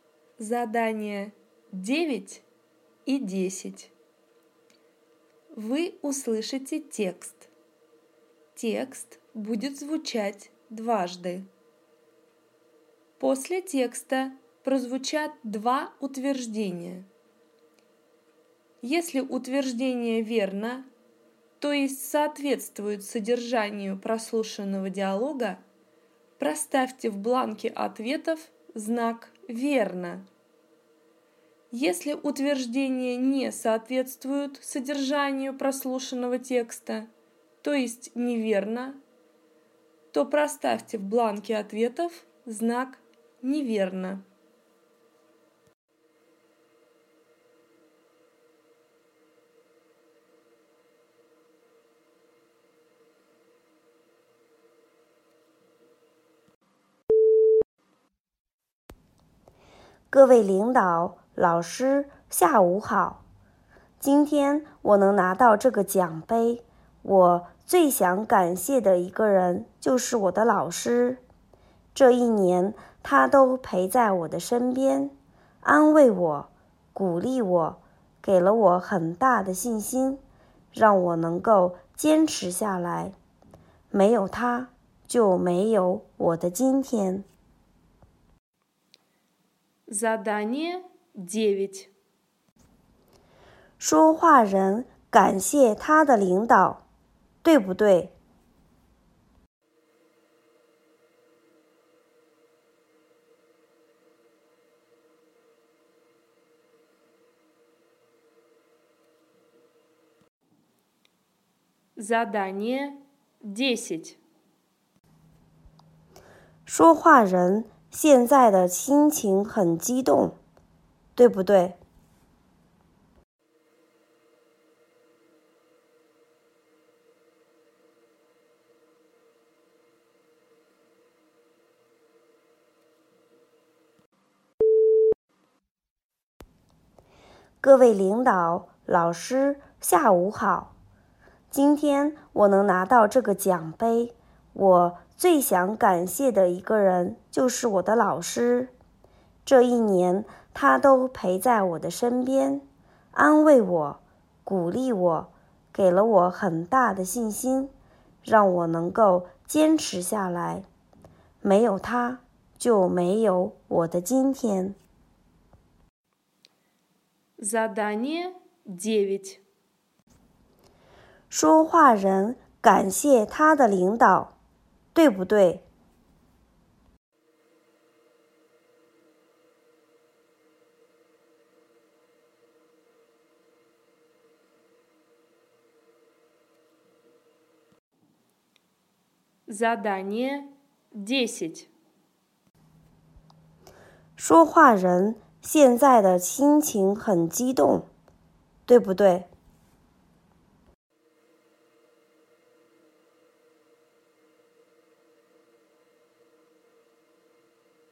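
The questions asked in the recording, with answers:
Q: 说话人感谢他的领导,对不对?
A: 不对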